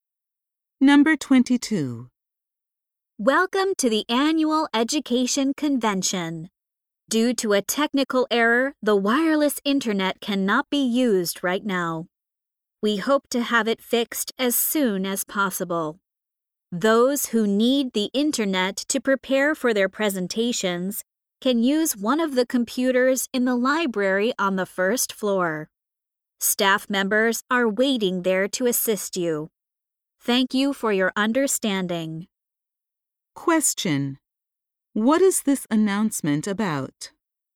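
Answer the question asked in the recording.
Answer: The wireless internet cannot be used right now because of a technical error.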